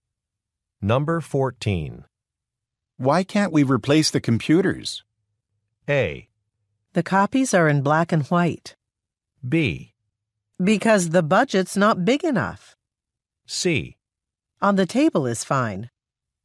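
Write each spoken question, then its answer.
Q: Why can't we replace the computers?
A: B: Because the budget's not big enough.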